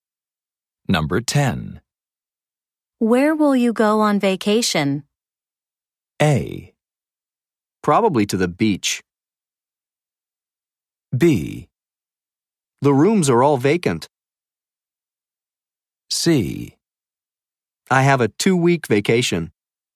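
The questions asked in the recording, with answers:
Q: Where will you go on vacation?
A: A: Probably to the beach.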